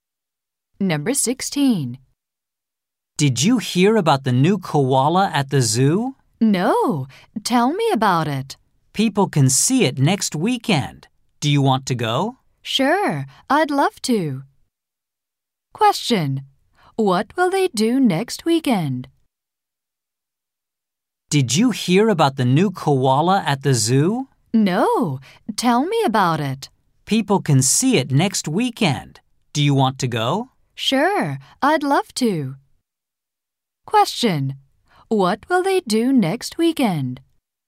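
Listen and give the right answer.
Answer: Go to the zoo to see the new koala.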